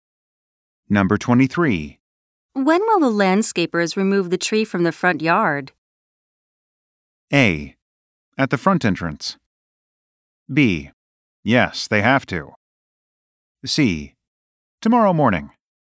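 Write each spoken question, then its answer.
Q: When will the landscapers remove the tree from the front yard?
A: C: Tomorrow morning.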